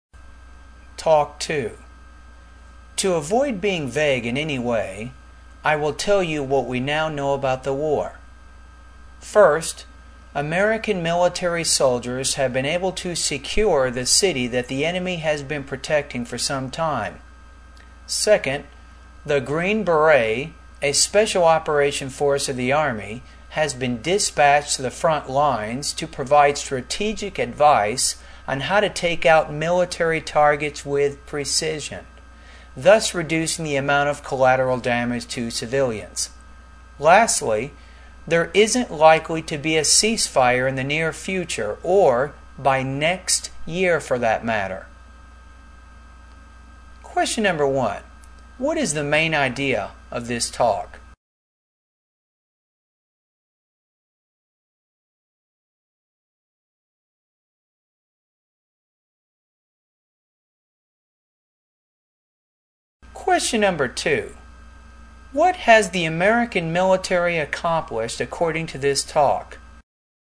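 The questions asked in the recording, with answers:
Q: What has the American military accomplished according to this talk?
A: It has secured the city the enemy had been protecting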